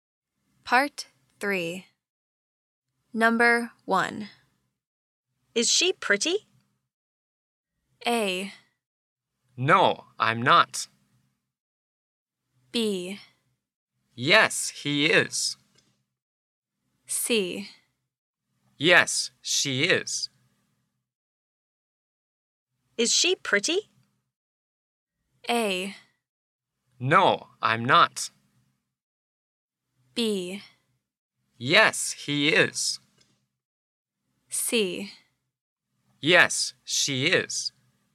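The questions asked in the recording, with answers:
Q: Is she pretty?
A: C: Yes, she is.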